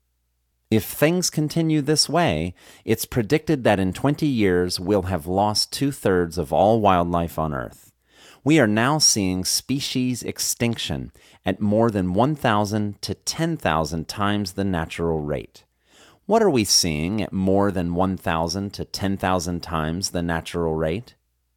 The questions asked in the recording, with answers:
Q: What are we seeing at more than 1,000 to 10,000 times the natural rate?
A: We are seeing species extinction at more than 1,000 to 10,000 times the natural rate.